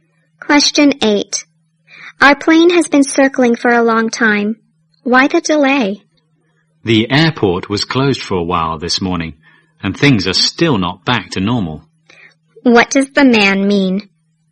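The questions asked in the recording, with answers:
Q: What does the man mean?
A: The airport was closed for a while and things aren't back to normal yet.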